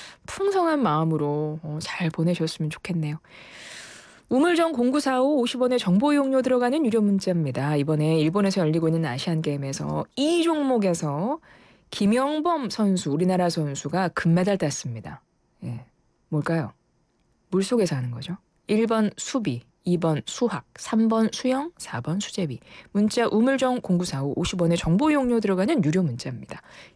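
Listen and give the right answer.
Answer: 3: 수영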